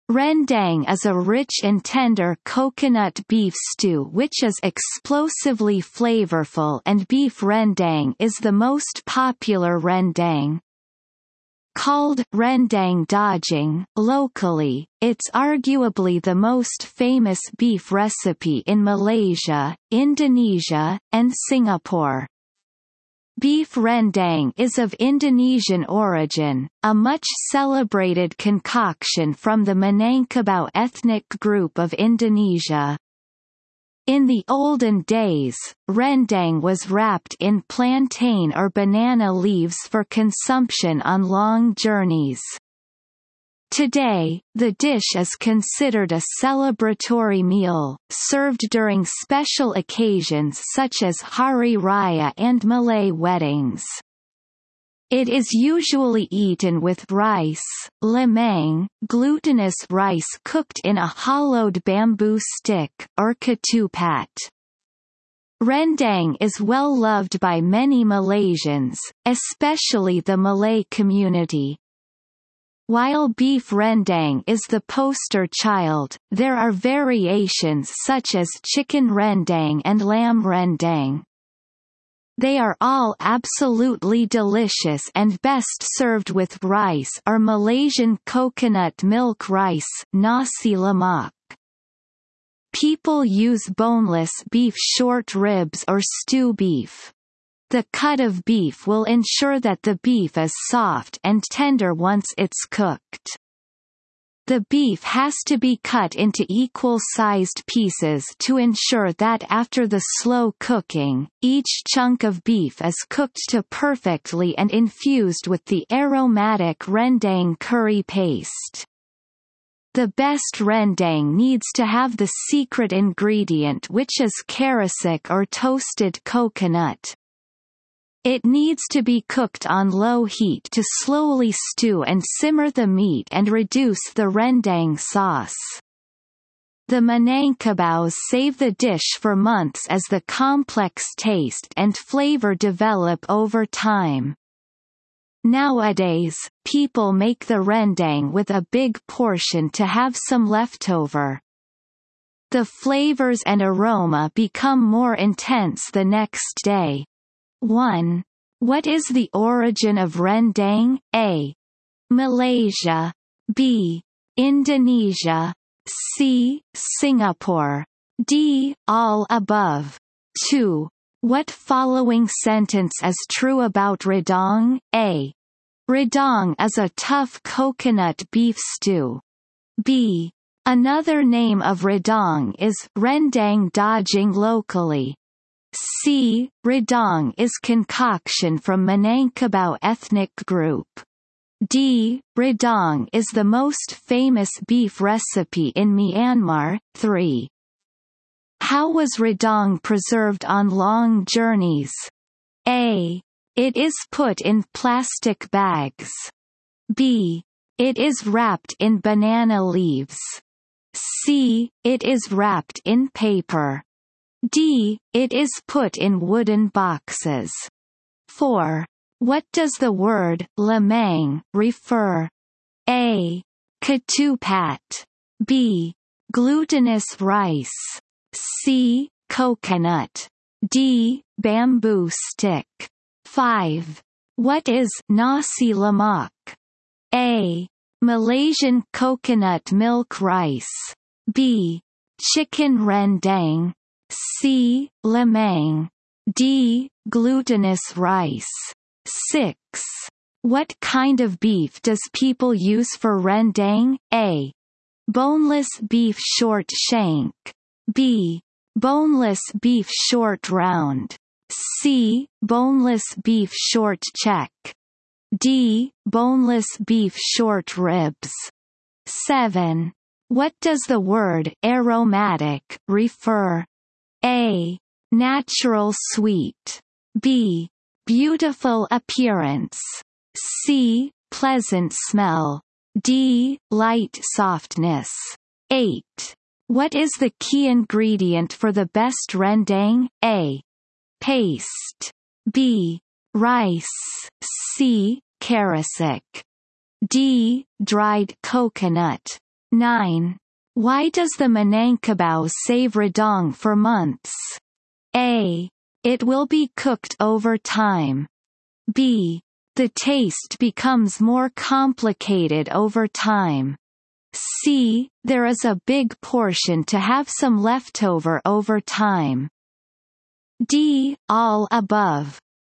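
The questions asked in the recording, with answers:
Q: What is the origin of rendang?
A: B: Indonesia.

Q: How was rendang preserved on long journeys?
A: B: It is wrapped in banana leaves.

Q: What does the word lemang refer?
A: B: Glutinous rice.

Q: What is nasi lemak?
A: A: Malaysian coconut milk rice.

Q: What kind of beef does people use for rendang?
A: D: Boneless beef short ribs.

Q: What does the word aromatic refer?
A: C: Pleasant smell.

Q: What is the key ingredient for the best rendang?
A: C: Karasik.

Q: Why does the Manangkabau save Radong for months?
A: B: The taste becomes more complicated over time.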